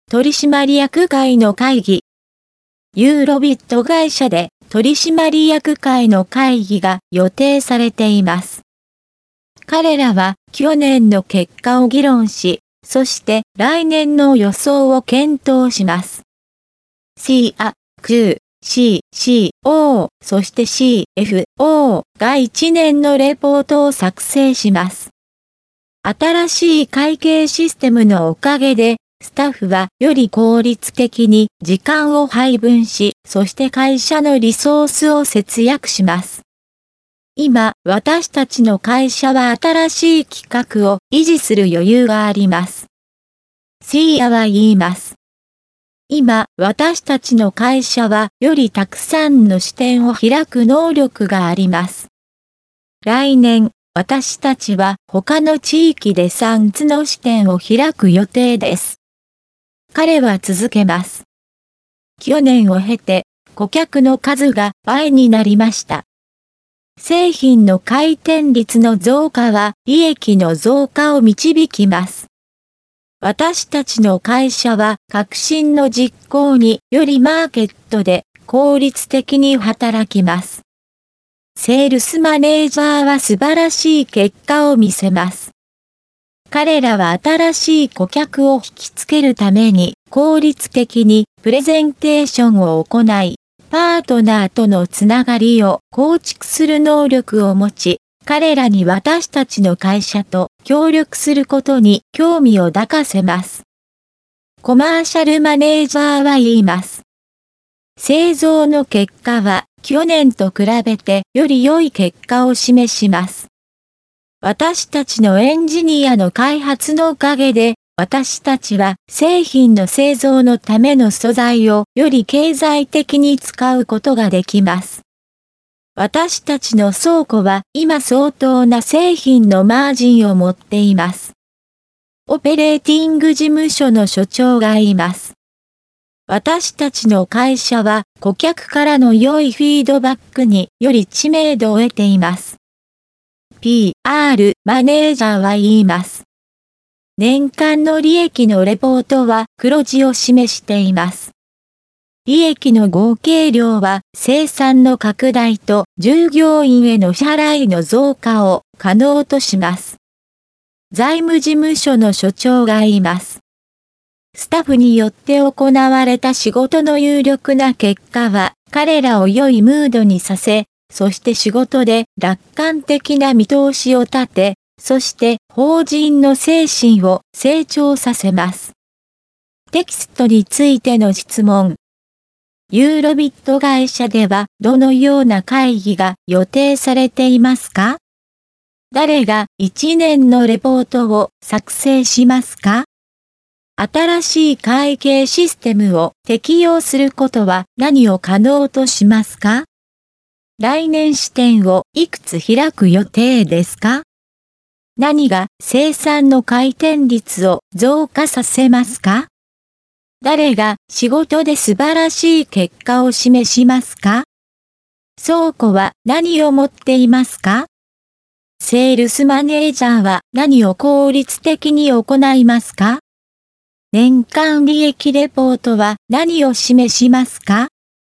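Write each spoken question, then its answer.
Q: ユーロビット会社ではどのような会議が予定されていますか?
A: 取締役会の会議

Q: 誰が1年のレポートを作成しますか?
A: CIA、CU、CCO、そしてCFO

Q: 新しい会計システムを適用することは何を可能としますか?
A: スタッフがより効率的に時間を配分し、会社のリソースを節約すること

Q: 来年視点をいくつ開く予定ですか?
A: 3つ

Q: 誰が仕事で素晴らしい結果を示しますか?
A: セールスマネージャー

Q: 倉庫は何を持っていますか?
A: 相当な製品のマージン

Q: セールスマネージャーは何を効率的に行いますか?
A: 新しい顧客を引きつけるためのプレゼンテーション

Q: 年間利益レポートは何を示しますか?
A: 黒字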